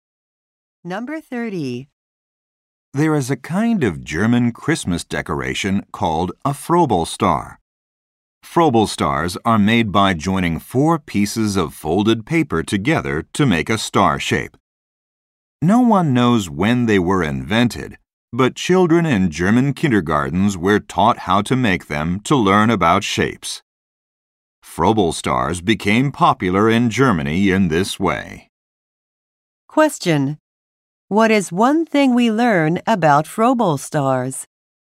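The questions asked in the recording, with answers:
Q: What is one thing we learn about Froebelstars?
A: Children in German kindergartens learned to make them to learn about shapes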